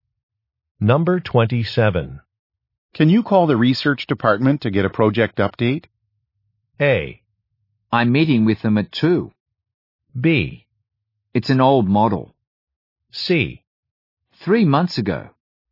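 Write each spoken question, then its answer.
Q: Can you call the research department to get a project update?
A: A: I'm meeting with them at 2.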